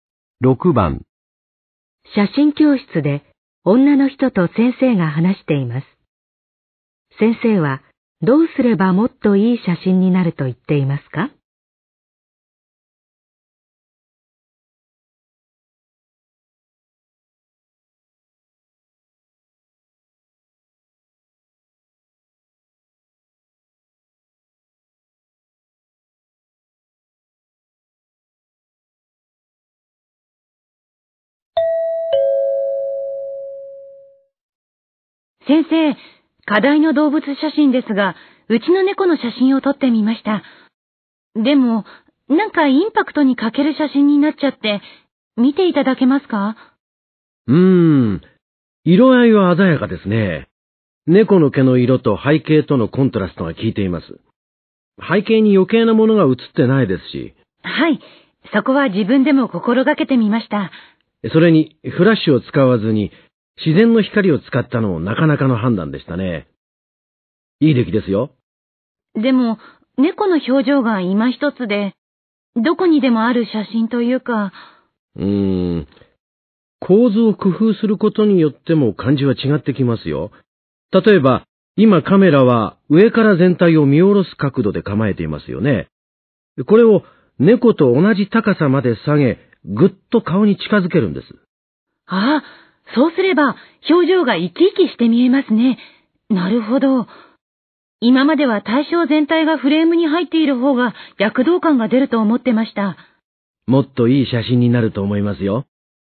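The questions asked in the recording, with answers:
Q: 先生はどうすればもっといい写真になると言っていますか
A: カメラを猫と同じ高さまで下げ、顔に近づけて撮る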